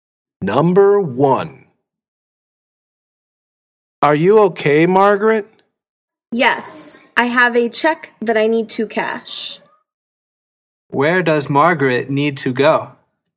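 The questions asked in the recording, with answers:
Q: Where does Margaret need to go?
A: the bank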